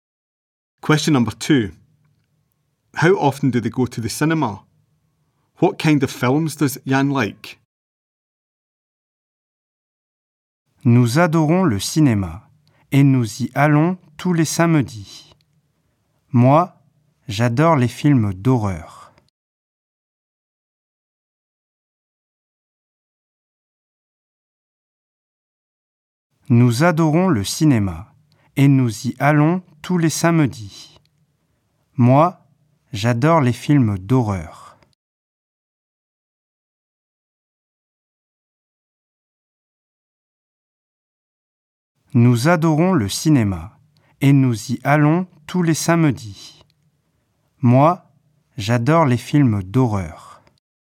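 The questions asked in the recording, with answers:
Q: How often do they go to the cinema?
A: Every Saturday

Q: What kind of films does Yann like?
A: Horror films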